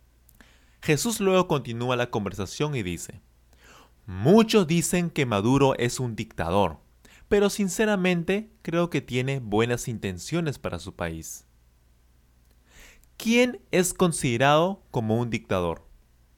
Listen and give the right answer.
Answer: Nicolás Maduro. Él es considerado un dictador.